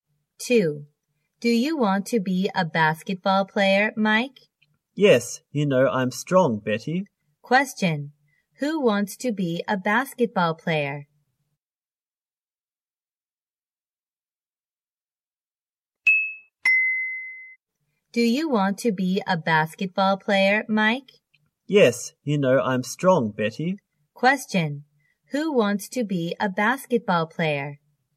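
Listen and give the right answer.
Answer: Mike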